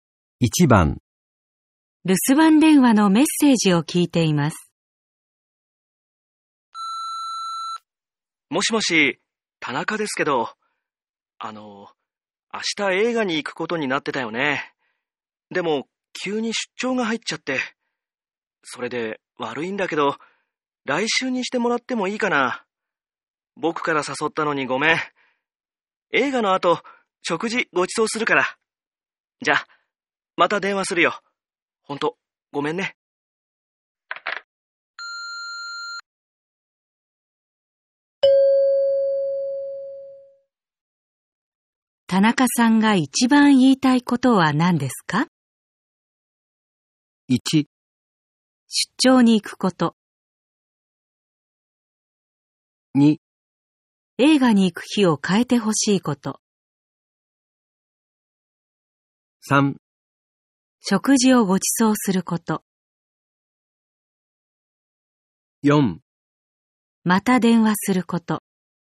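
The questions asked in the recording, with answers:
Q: 田中さんが一番言いたいことは何ですか?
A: 2: 映画に行く日を変えてほしいこと。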